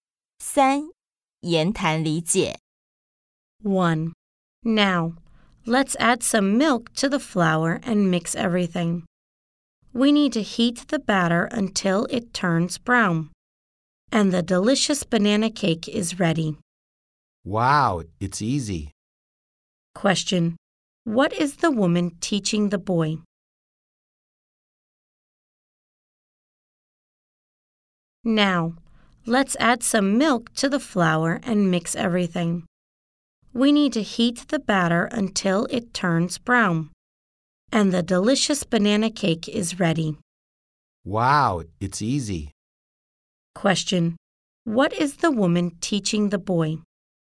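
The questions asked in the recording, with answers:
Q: What is the woman teaching the boy?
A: How to make a banana cake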